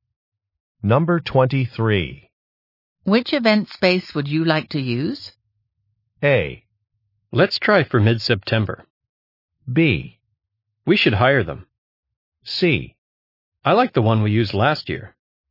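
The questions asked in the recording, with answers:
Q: Which event space would you like to use?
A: C: I like the one we used last year.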